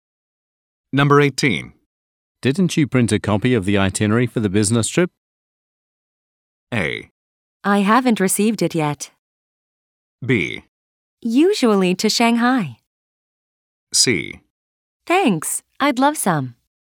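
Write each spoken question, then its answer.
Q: Didn't you print a copy of the itinerary for the business trip?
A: A: I haven't received it yet.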